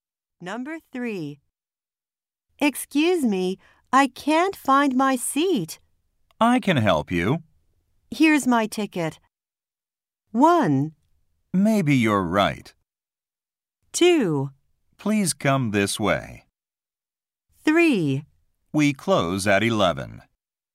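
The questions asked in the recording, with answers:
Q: Here's my ticket.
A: 2: Please come this way.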